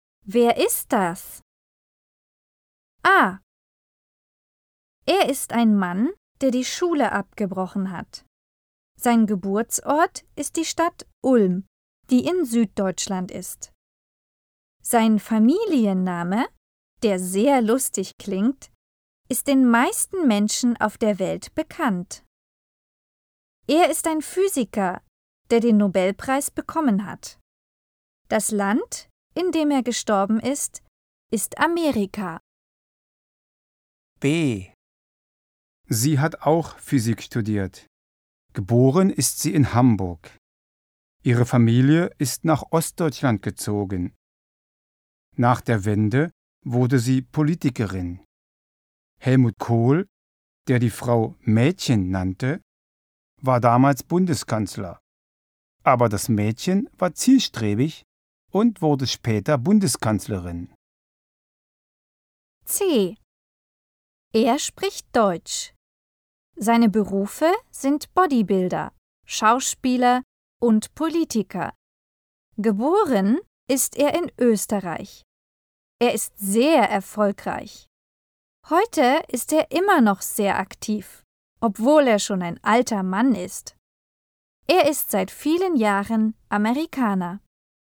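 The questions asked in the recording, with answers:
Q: Wer ist das?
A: Albert Einstein

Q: Wer ist das?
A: Angela Merkel

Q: Wer ist das?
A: Arnold Schwarzenegger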